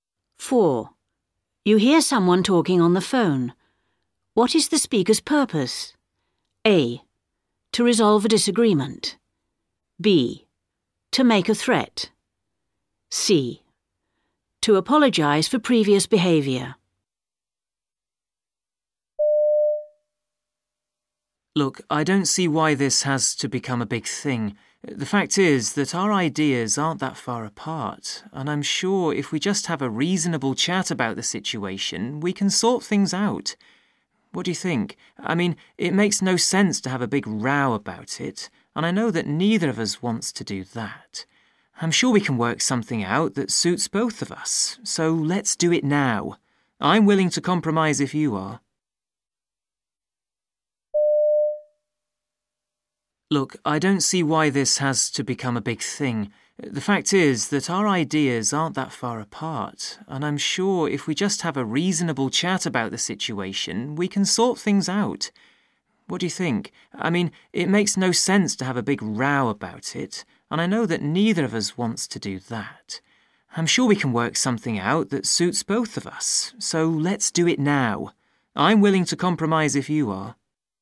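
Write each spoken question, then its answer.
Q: What is the speaker's purpose?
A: A: To resolve a disagreement.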